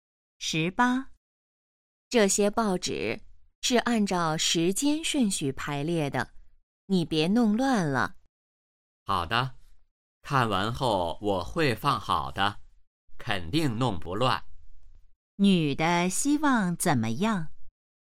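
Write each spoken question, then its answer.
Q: 女的希望怎么样?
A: 别把报纸的顺序弄乱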